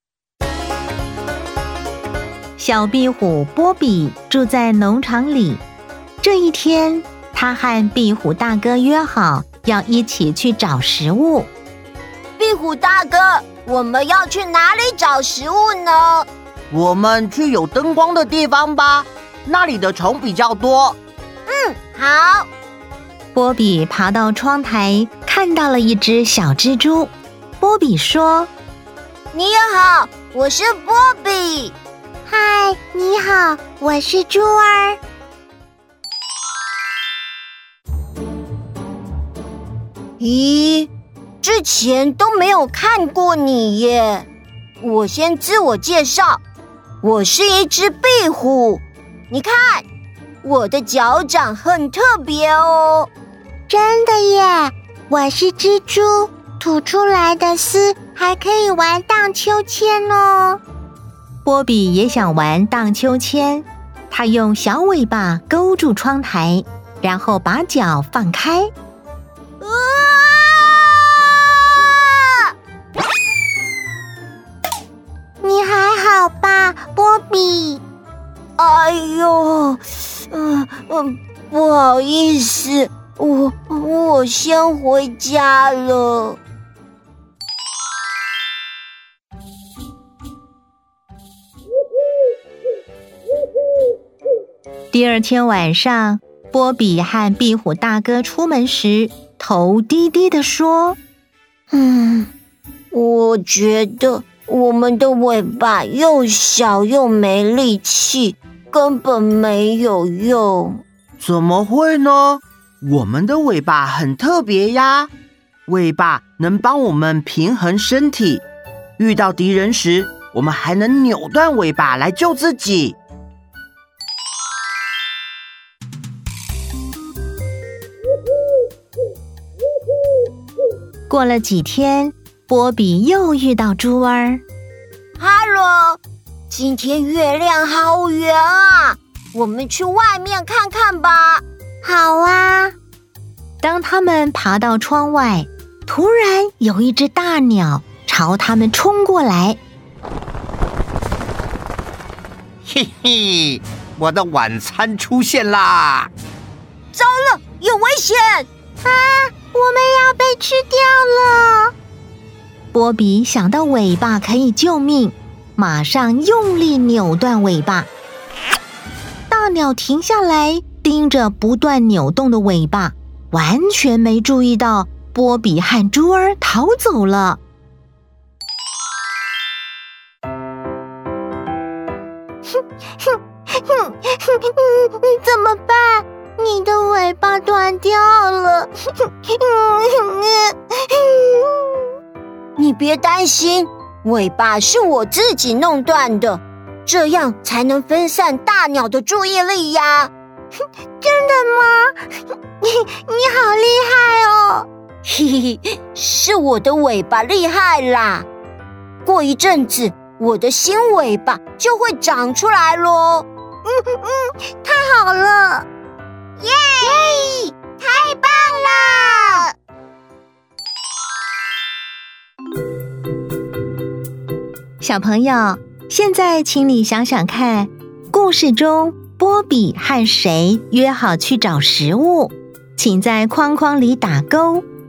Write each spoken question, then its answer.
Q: 故事中波比和谁约好去找食物,请在框框里打勾。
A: 壁虎大哥。